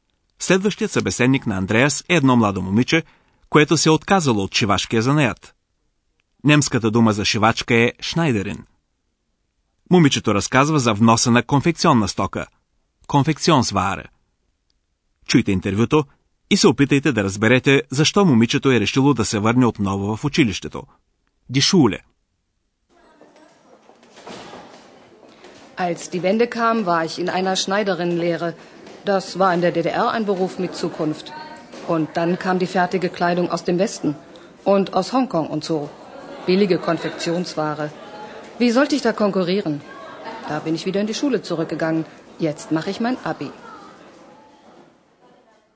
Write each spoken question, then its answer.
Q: чуйте интервюто и се опитайте да разберете защо момичето е решило да се върне отново в училището.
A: Затова момичето се върнало в училище, за да вземе зрелостния си изпит.